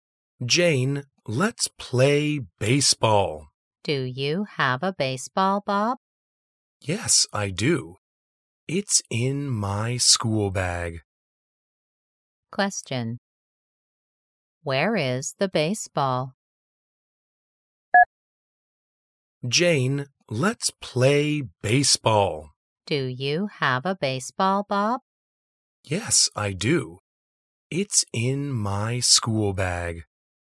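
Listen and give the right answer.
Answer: In Bob's school bag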